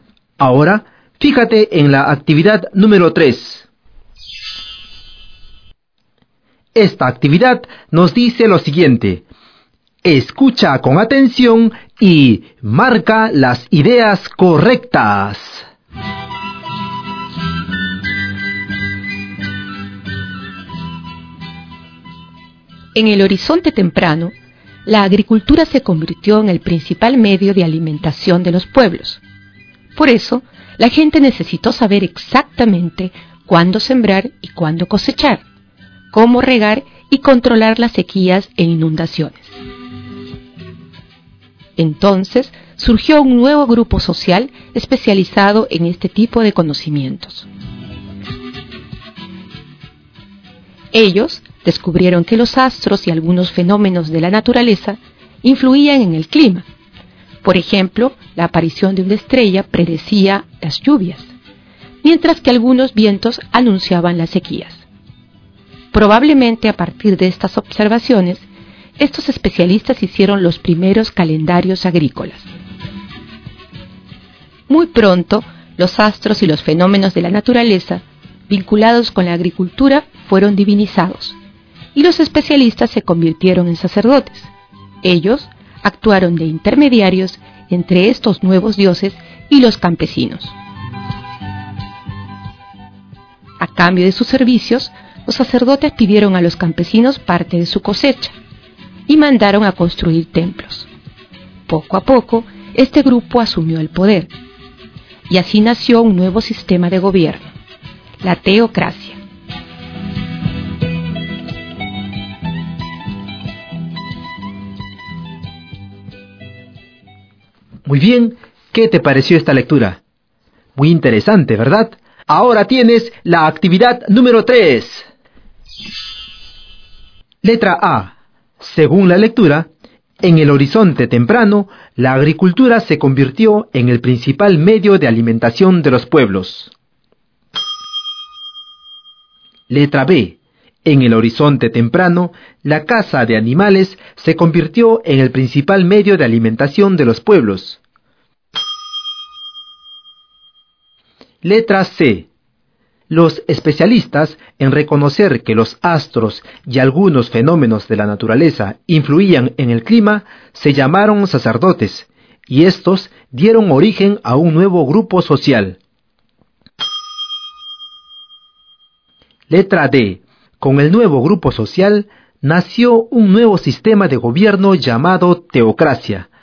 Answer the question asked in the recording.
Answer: espero que en la actividad anterior hayas podido identificar la única idea incorrecta, que es la letra B.